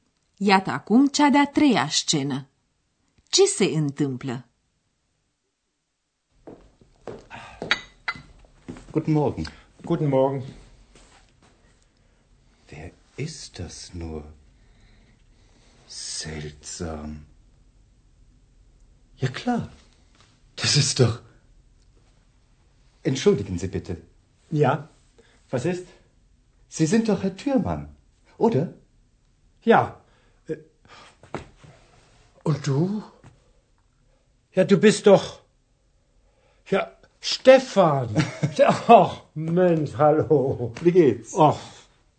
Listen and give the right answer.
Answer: Dr. Thürmann s-a întâlnit pe neașteptate cu un prieten pe care nu l-a mai văzut de multă vreme.